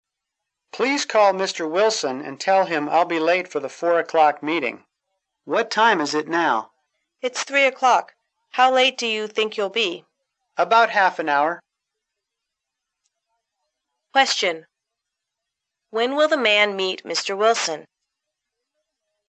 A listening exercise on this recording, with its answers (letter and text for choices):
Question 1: When will the man meet Mr. Wilson?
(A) At 3:00.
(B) At 3:30.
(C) At 4:00.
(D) At 4:30.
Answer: (D) At 4:30.

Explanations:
对话中问Mr. Wilson会迟到多久,由男士的回答About half an hour可知D选项正确。